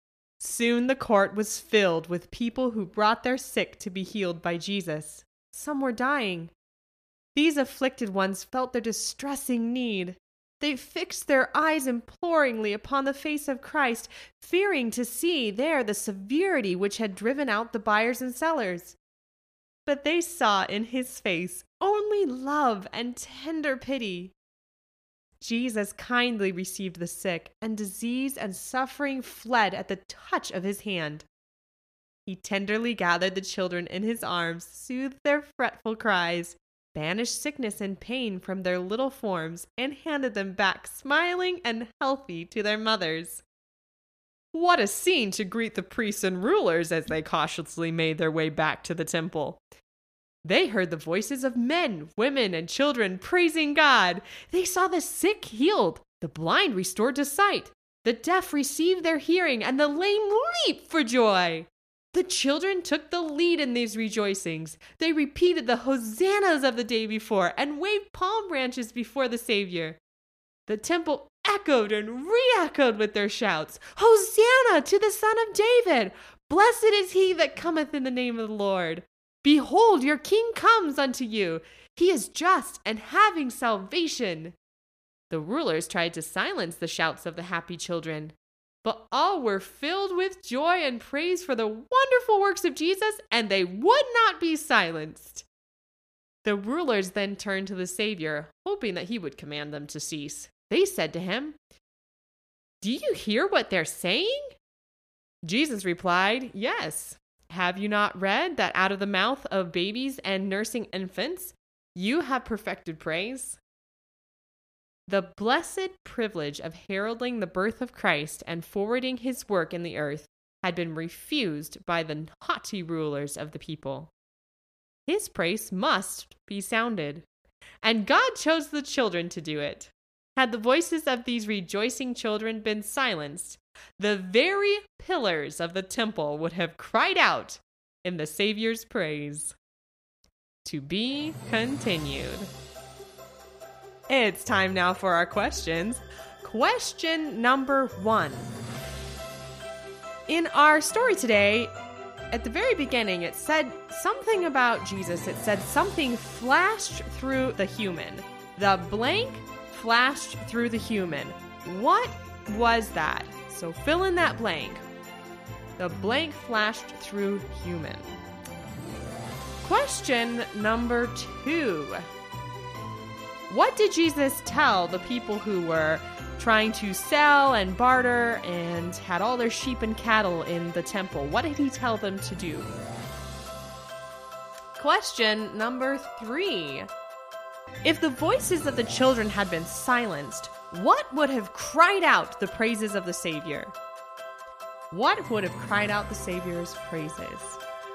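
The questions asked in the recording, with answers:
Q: If the voices of the children had been silenced, what would have cried out the praises of the Savior?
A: the very pillars of the temple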